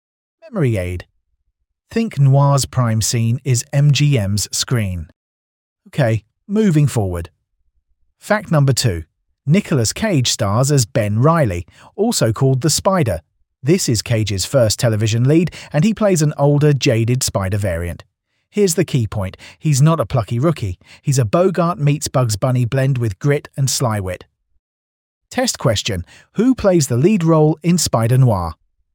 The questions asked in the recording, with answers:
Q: Who plays the lead role in Spider-Noir?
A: Nicolas Cage.